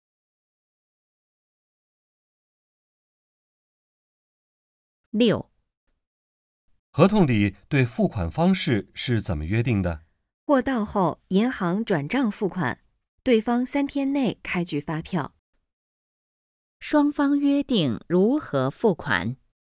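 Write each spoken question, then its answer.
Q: 双方约定如何付款?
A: 货到后银行转账付款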